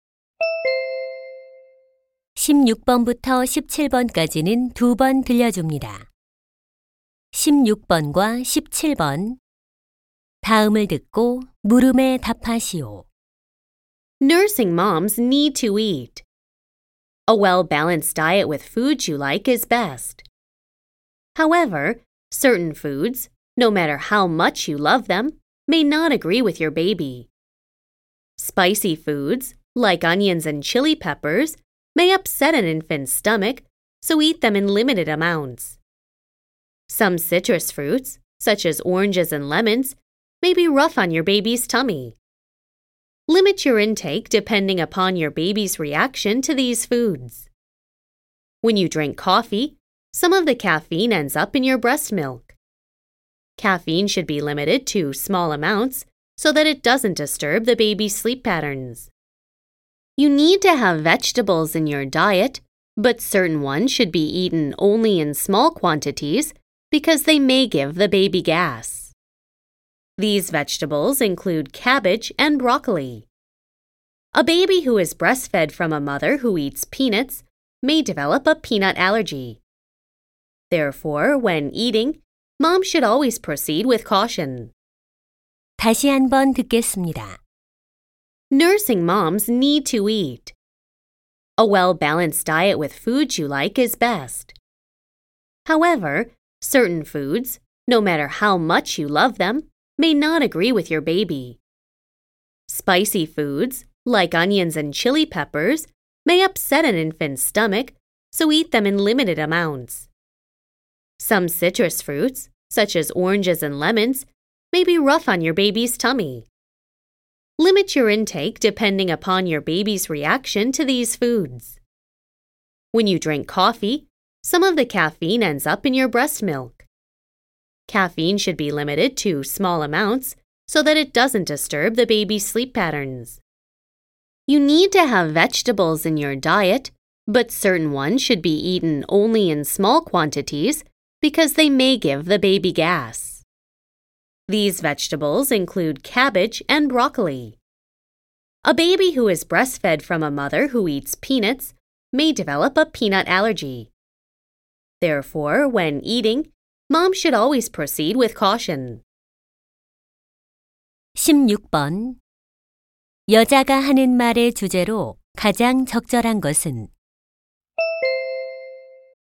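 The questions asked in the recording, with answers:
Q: 여자가 하는 말의 주제로 가장 적절한 것은?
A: 수유 중인 엄마가 섭취를 줄여야 할 음식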